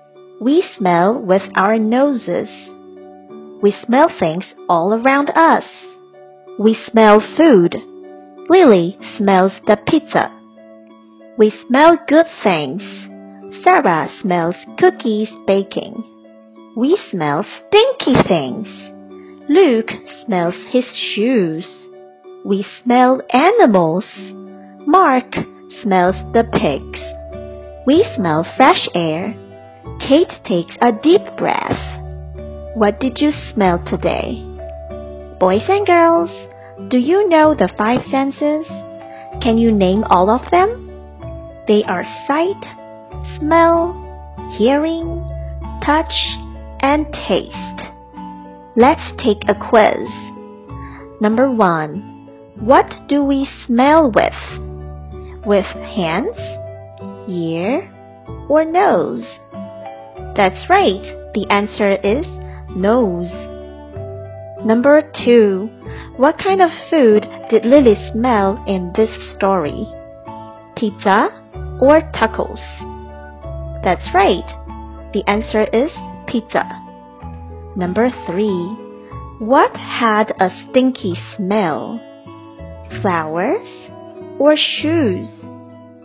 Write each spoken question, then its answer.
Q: What do we smell with? With hands, ear, or nose?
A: The answer is nose.

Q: What had a stinky smell? flowers, or shoes?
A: The answer is shoes.